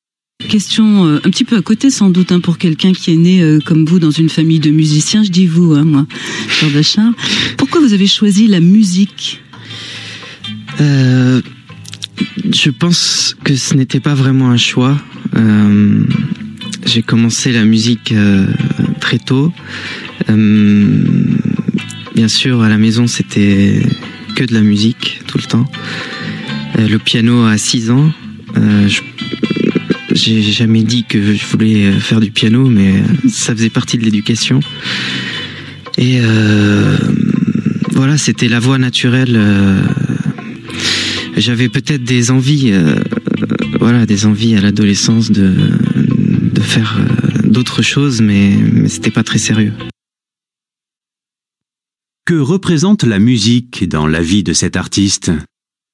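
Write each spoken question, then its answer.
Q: Que représente la musique dans la vie de cet artiste ?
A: Une voie naturelle : elle faisait partie de son éducation, ce n'était pas vraiment un choix.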